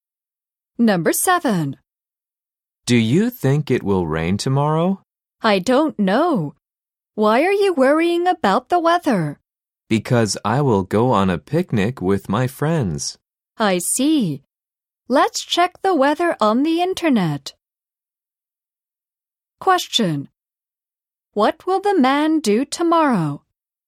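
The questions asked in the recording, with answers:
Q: What will the man do tomorrow?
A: Go on a picnic with his friends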